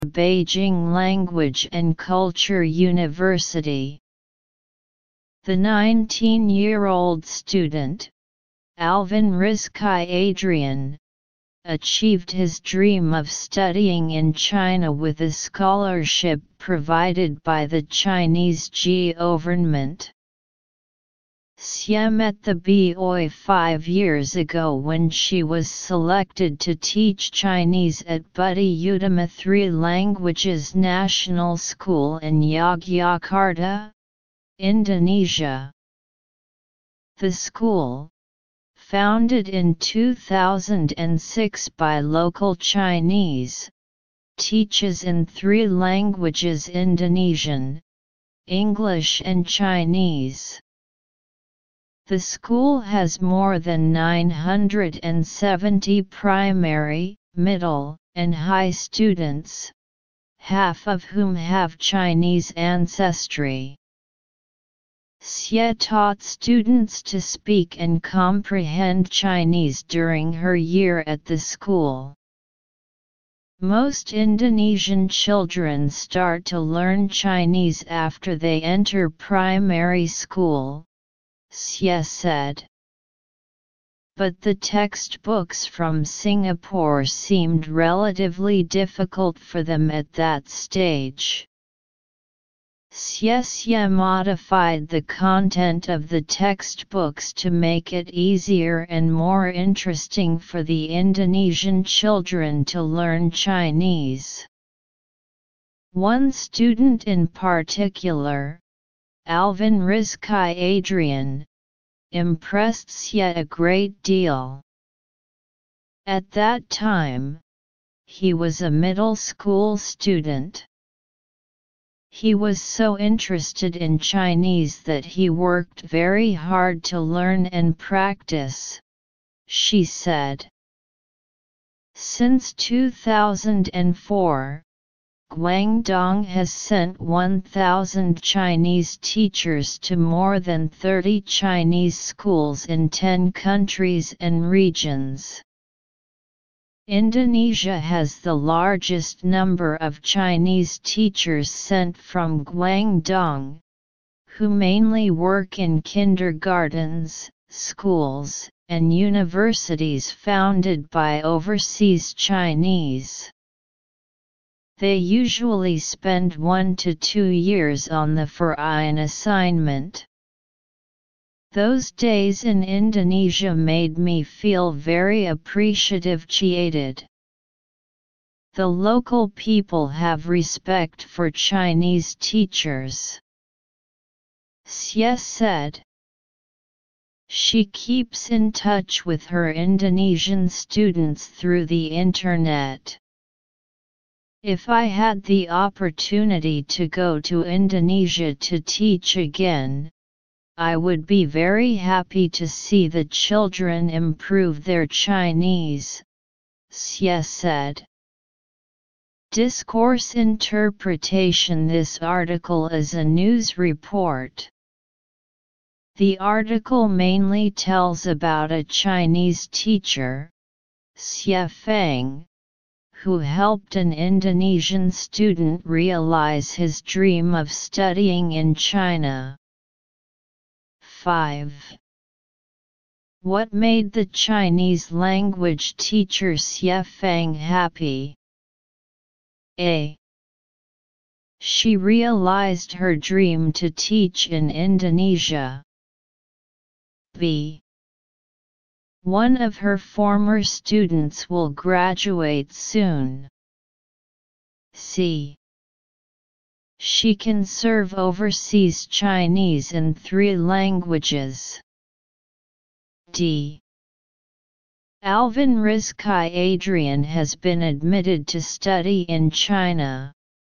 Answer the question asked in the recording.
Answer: D. Detailed comprehension questions.